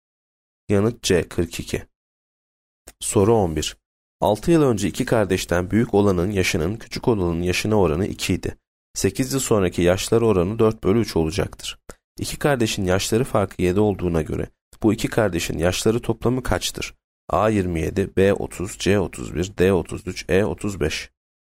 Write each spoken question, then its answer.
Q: İki kardeşin yaşları farkı 7 olduğuna göre bu iki kardeşin yaşları toplamı kaçtır?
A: Yanıt D 33.